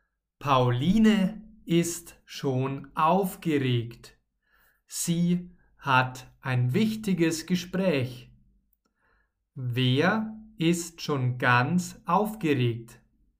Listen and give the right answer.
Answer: Pauline. Sie ist schon ganz aufgeregt.